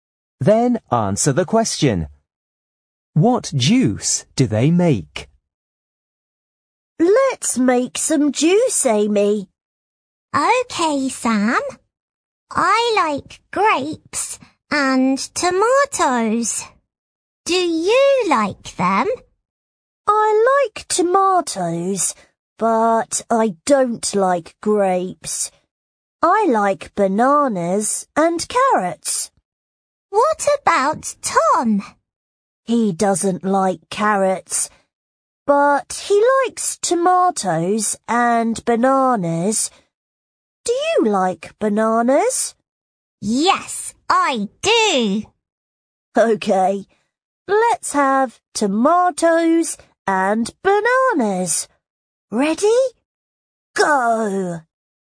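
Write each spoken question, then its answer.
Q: What juice do they make?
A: Tomato and banana juice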